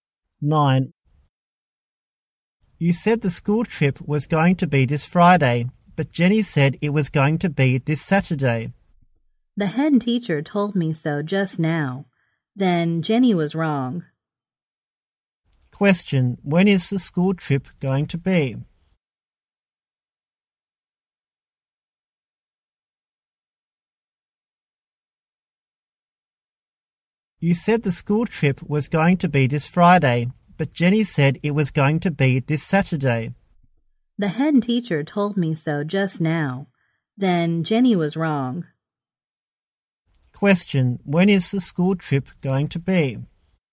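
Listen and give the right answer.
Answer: This Friday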